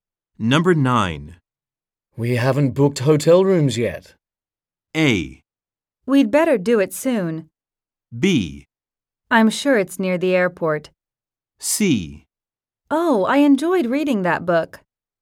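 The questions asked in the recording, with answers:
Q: We haven't booked hotel rooms yet.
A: A: We'd better do it soon.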